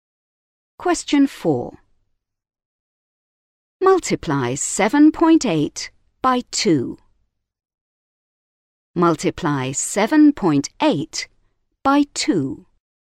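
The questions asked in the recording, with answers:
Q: Multiply 7.8 by 2.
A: 15.6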